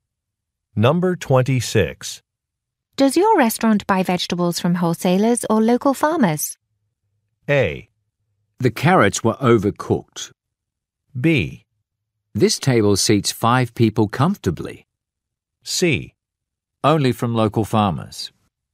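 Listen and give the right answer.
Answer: C: Only from local farmers.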